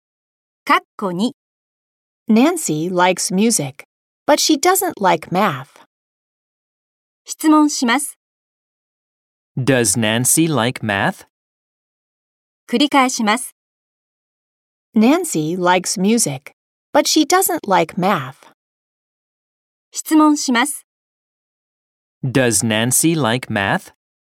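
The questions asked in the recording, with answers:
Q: Does Nancy like math?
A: No, she doesn't.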